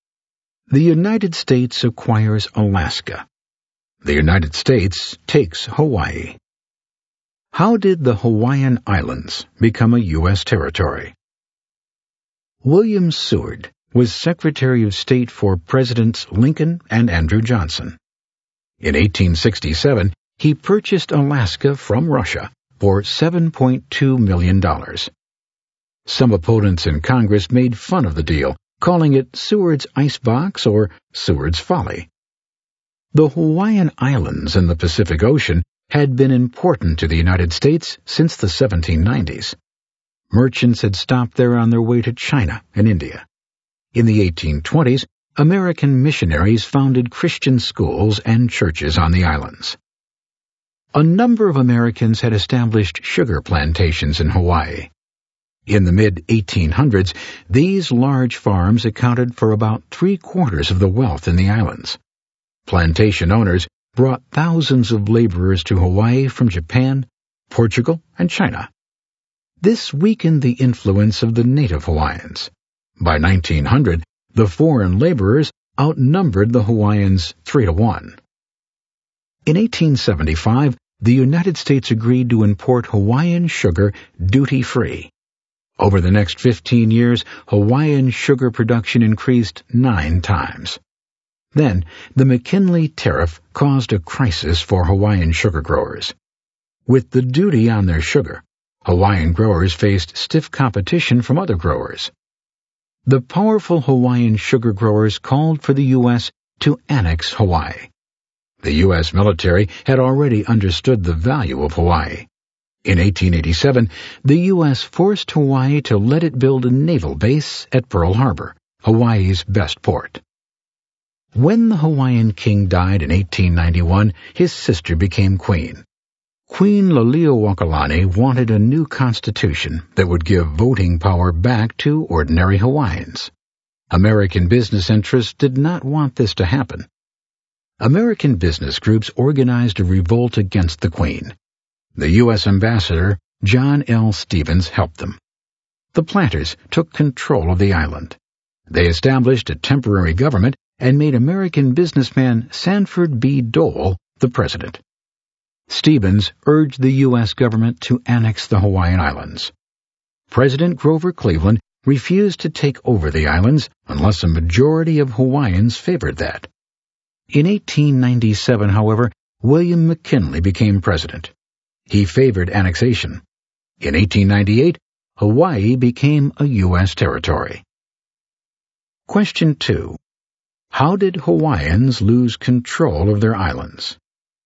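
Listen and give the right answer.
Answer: American planters and business groups, helped by the U.S. ambassador, revolted against the Queen and took control, and the U.S. annexed Hawaii in 1898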